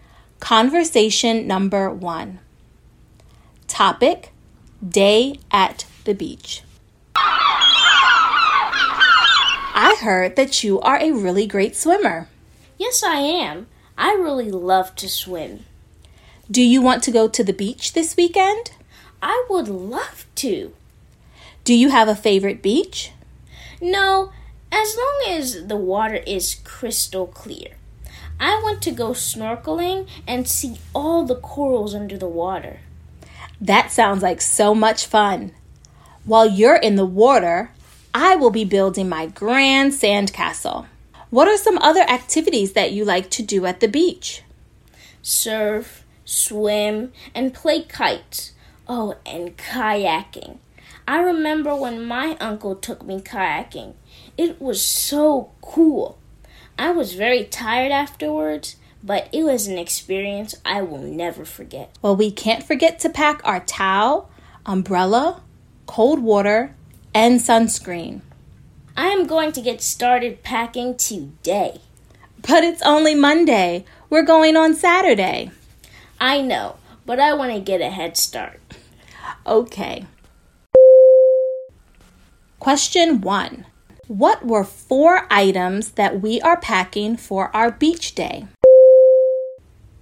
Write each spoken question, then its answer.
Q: What were four items that we are packing for our beach day?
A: If you said towel, umbrella, cold water, and sunscreen, you are correct.